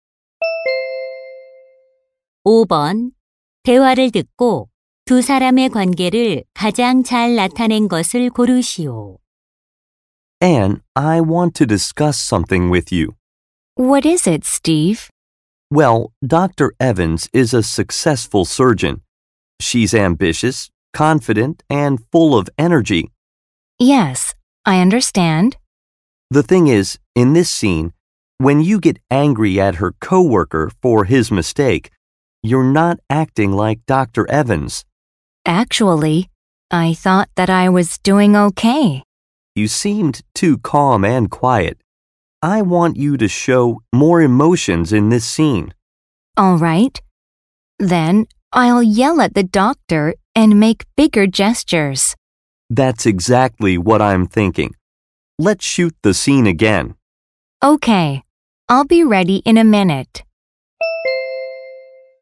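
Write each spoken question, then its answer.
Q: 대화를 듣고 두 사람의 관계를 가장 잘 나타낸 것을 고르시오.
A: 영화 감독 - 배우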